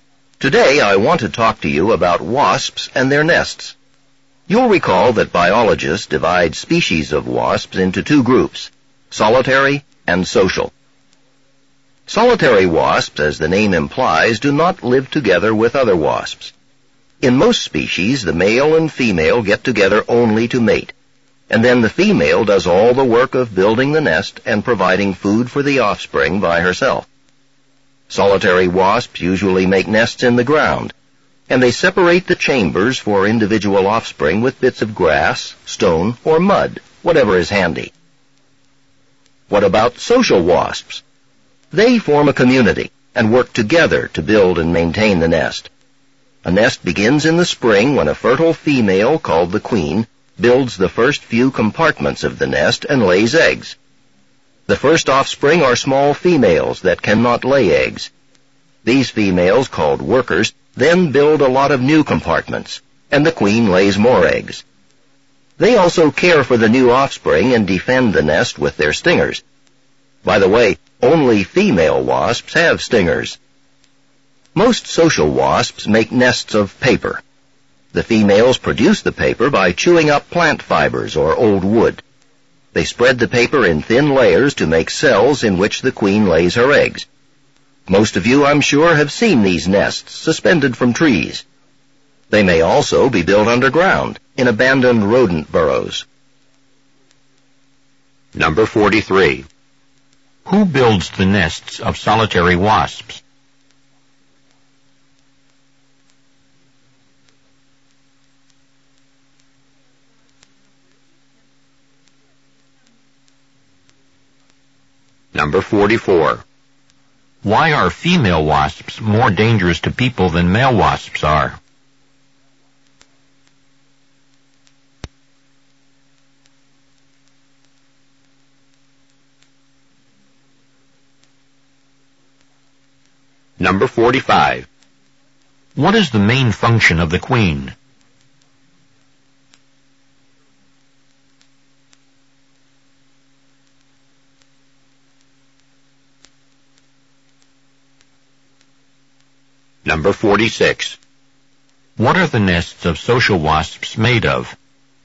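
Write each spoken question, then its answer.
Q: Who builds the nests of solitary wasps?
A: The female

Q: Why are female wasps more dangerous to people than male wasps are?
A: Only females have stingers

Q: What is the main function of the queen?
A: To lay eggs

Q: What are the nests of social wasps made of?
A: Paper (chewed plant fibers or old wood)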